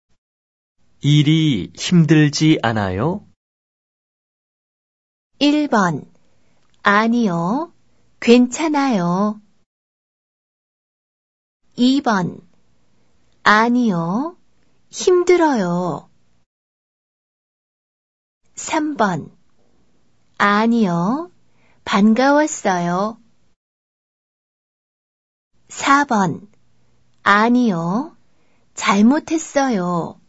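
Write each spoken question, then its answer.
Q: 일이 힘들지 않아요?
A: 1: 아니요. 괜찮아요.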